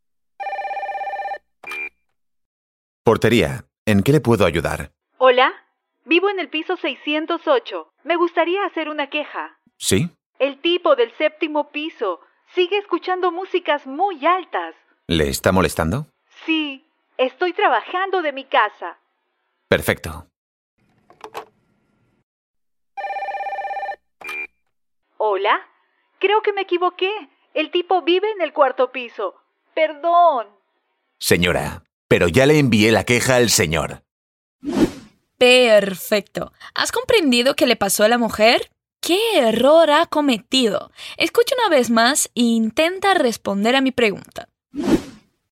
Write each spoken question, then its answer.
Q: ¿Qué error ha cometido?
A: Ay, no, que ha cometido un error acerca de dónde vive el tipo de las canciones altas.